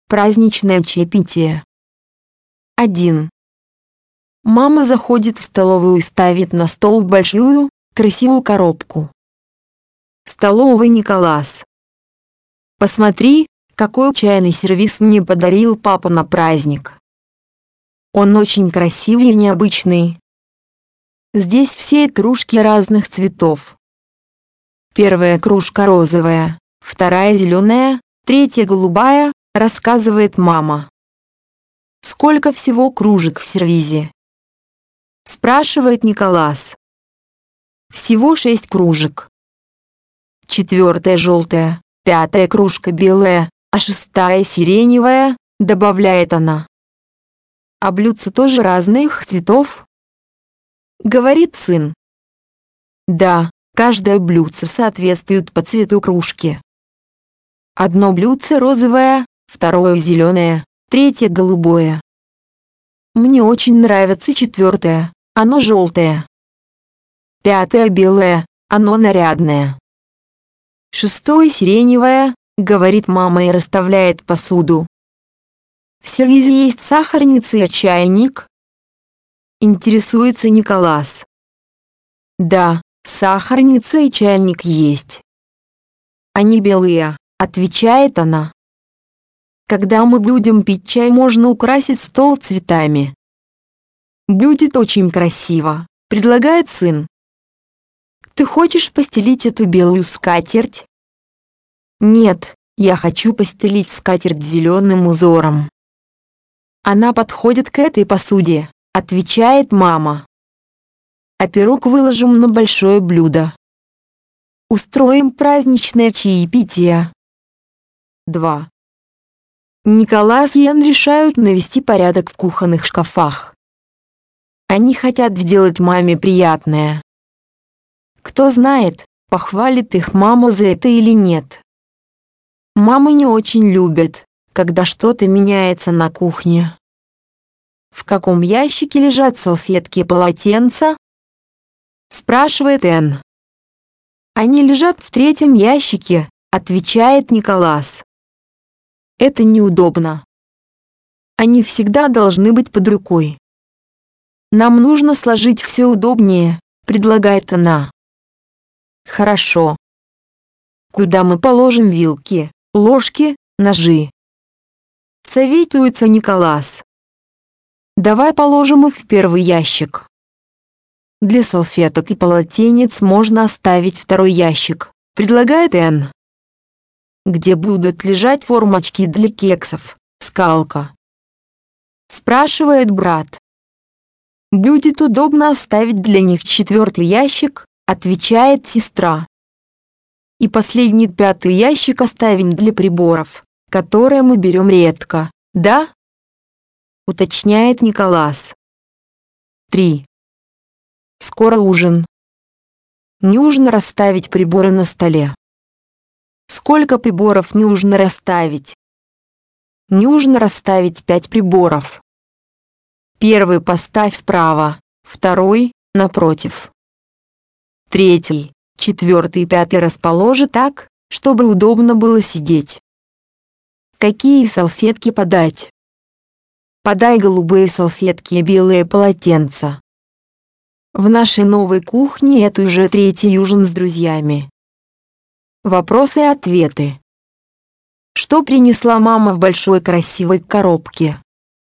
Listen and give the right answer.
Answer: Она принесла в коробке чайный сервиз.